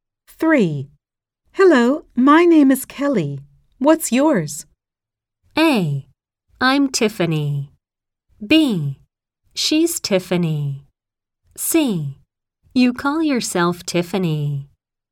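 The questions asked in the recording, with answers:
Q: Hello, my name is Kelly. What's yours?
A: A: I'm Tiffany.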